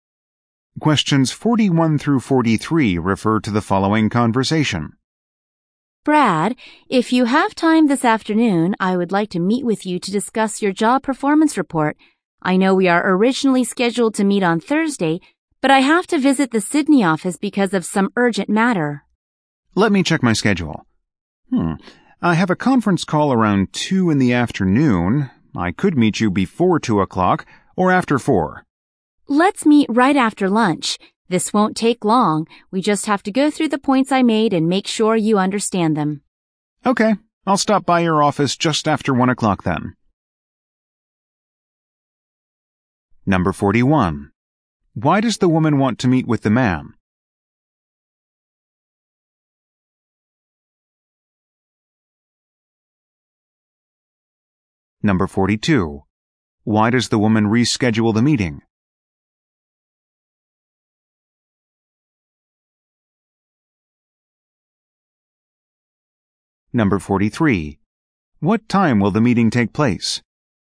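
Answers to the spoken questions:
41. To discuss his job performance report
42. She has to visit the Sydney office for an urgent matter
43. Just after 1 o'clock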